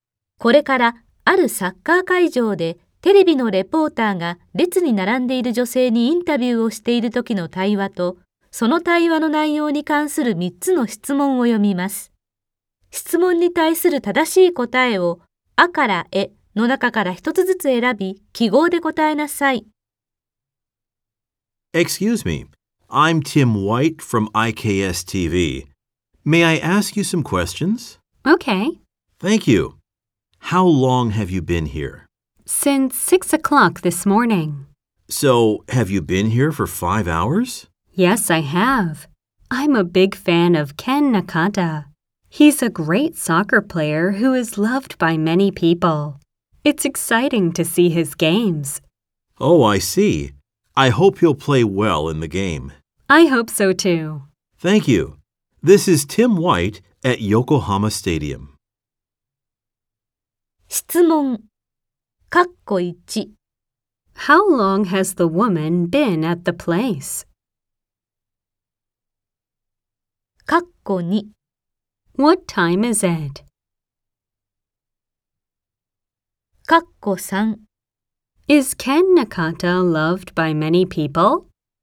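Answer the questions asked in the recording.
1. For 5 hours (since 6 o'clock this morning)
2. 11 o'clock
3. Yes, he is.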